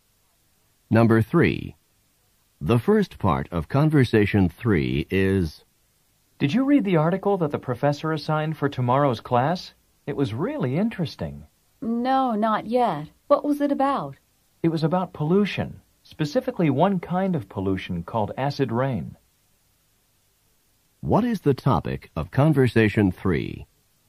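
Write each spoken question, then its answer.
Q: What is the topic of Conversation 3?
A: Acid rain (an article about pollution)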